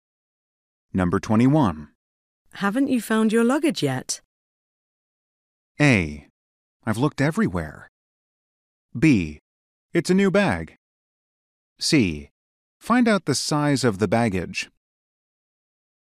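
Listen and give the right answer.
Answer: A: I've looked everywhere.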